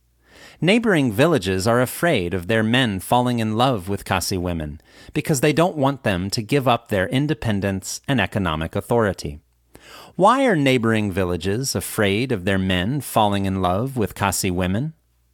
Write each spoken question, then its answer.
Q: Why are neighboring villages afraid of their men falling in love with Khasi women?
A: Neighboring villages are afraid of their men falling in love with Khasi women because they don't want them to give up their independence and economic authority.